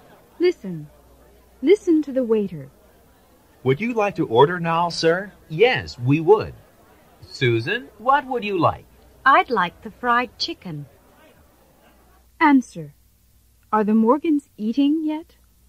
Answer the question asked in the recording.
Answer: No, they're not.